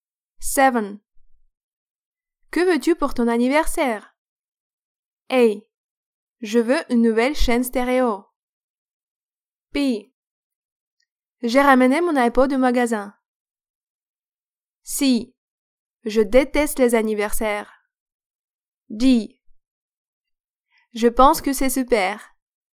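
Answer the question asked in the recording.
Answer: A: Je veux une nouvelle chaîne stéréo.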